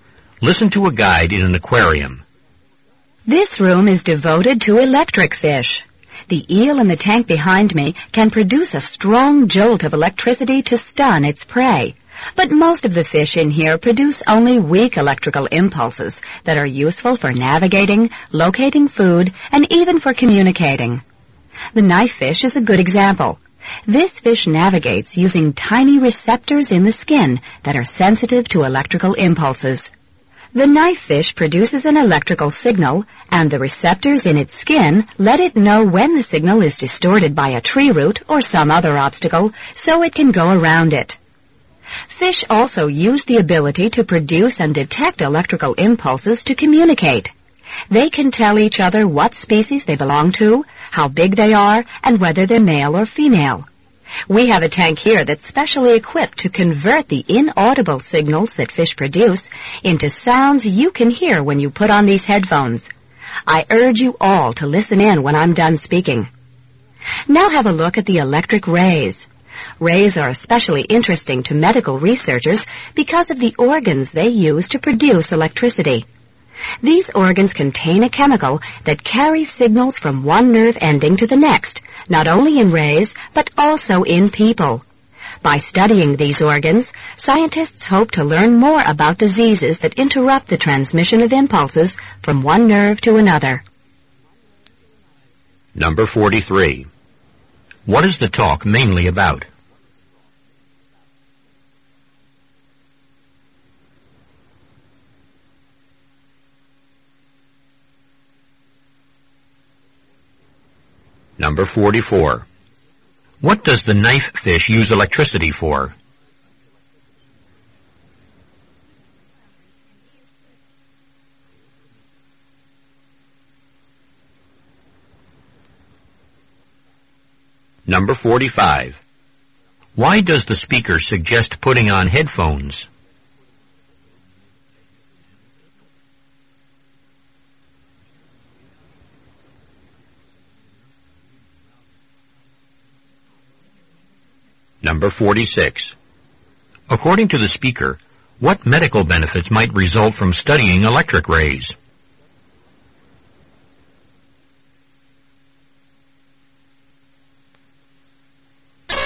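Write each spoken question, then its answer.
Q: What is the talk mainly about?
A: Electric fish and how they use electricity

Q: What does the knife fish use electricity for?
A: To navigate around obstacles

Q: Why does the speaker suggest putting on headphones?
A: To hear fish signals converted into sounds

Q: According to the speaker, what medical benefits might result from studying electric rays?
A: Learning more about diseases that interrupt nerve impulse transmission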